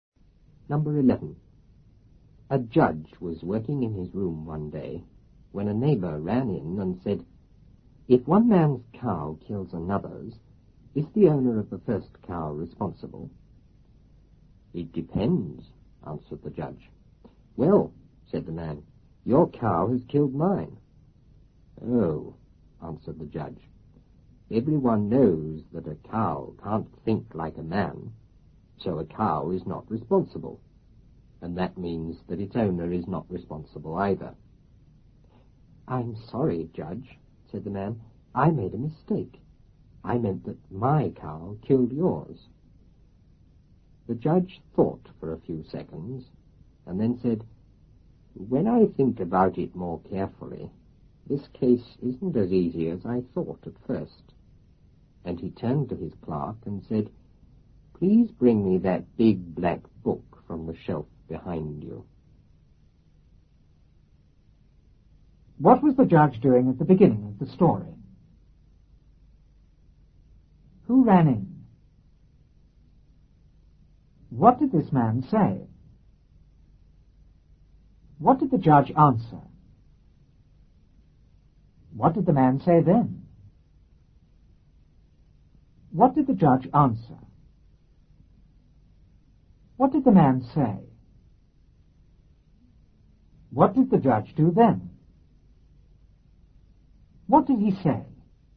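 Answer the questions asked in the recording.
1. Working in his room
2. A neighbor
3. If one man's cow kills another's, is the owner of the first cow responsible?
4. It depends
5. Your cow has killed mine
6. A cow can't think like a man, so neither the cow nor its owner is responsible
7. He made a mistake; his cow killed the judge's
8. Thought for a few seconds
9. The case isn't as easy as he thought; he asked his clerk for the big black book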